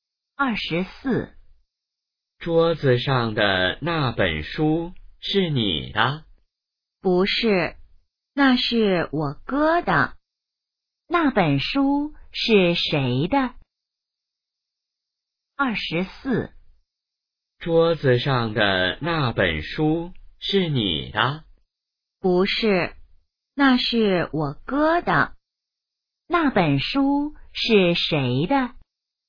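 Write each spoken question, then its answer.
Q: 那本书是谁的?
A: 她哥哥的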